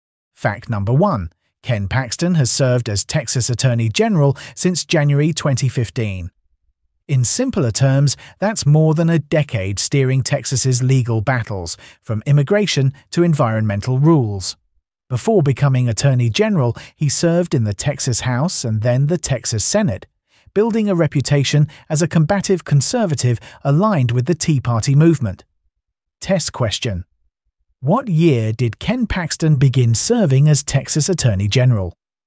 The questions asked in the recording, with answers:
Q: What year did Ken Paxton begin serving as Texas Attorney General?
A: Correct answer, 2015.